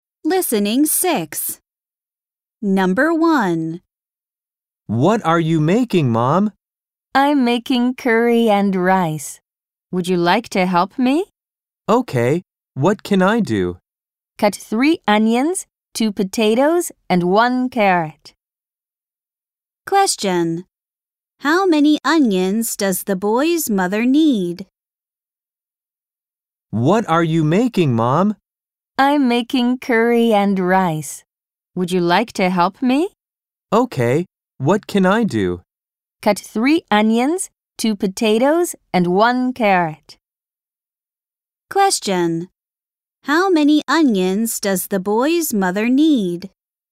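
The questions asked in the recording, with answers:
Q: How many onions does the boy's mother need?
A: Three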